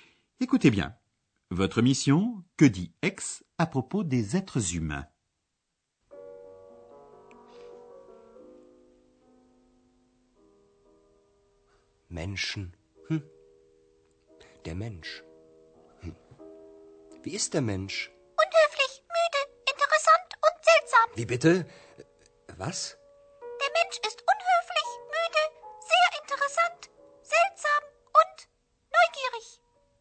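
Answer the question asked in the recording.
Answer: Ils sont impolis, fatigués, très intéressants, bizarres et curieux.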